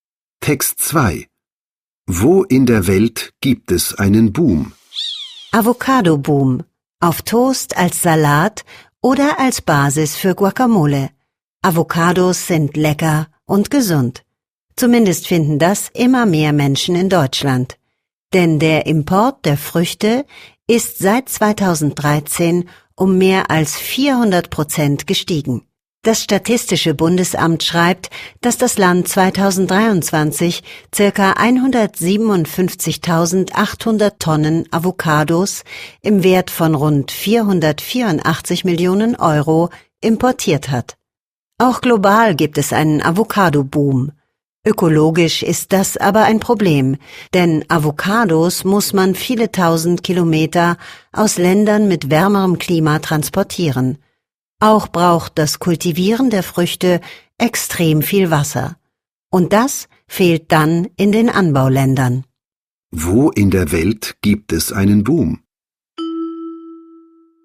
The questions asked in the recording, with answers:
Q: Wo in der Welt gibt es einen Boom?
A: Der Trend ist global. Auf der ganzen Welt boomt die Avocado.